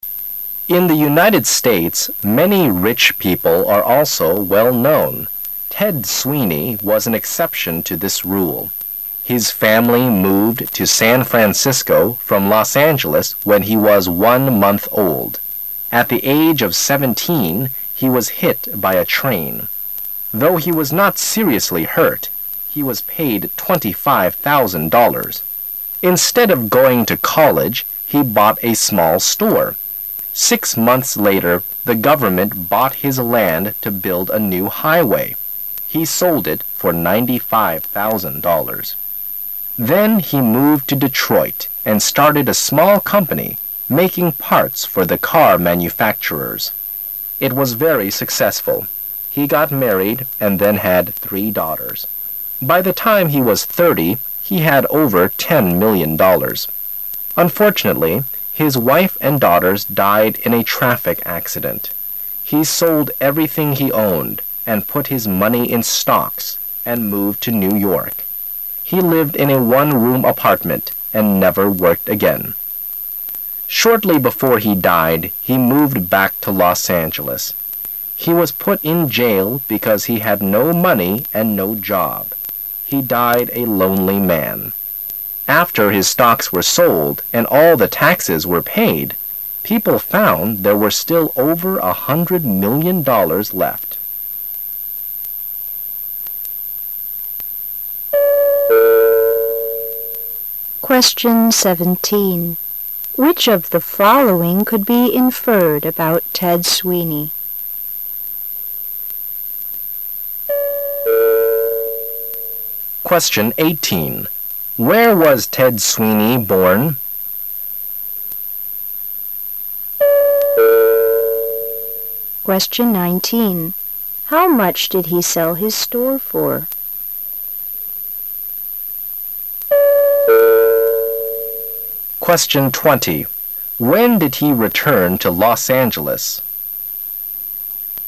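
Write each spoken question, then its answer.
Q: Where was Ted Sweeney born?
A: Los Angeles

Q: How much did he sell his store for?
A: $95,000

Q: When did he return to Los Angeles?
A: Shortly before he died

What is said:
[解析] 17-20 In the United States, many rich people are also well-known. Ted Sweeney was an exception to this rule. His family moved to San Francisco from Los Angeles when he was one month old. At the age of seventeen he was hit by a train. Though he was not seriously hurt, he was paid $ 25,000. Instead of going to college he bought a small store. Six months later the government bought his land to build a new high-way. He sold it for $ 95,000. Then he moved to Detroit and started a small company making parts for the car manufacturers. It was very successful. He got married and then had three daughters. By the time he was 30 he had over ten million dollars. Unfortunately, his wife and daughters died in a traffic accident. 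He sold everything he owned, and put his money in stocks, and moved to New York. He lived in a one-room apartment and never worked again. Shortly before he died he moved back to Los Angeles. He was put in jail because he had no money and no job. He died a lonely man. After his stocks were sold and all the taxes were paid, people found there were still over a hundred million dollars left. Which of the following could be inferred about Ted Sweeney?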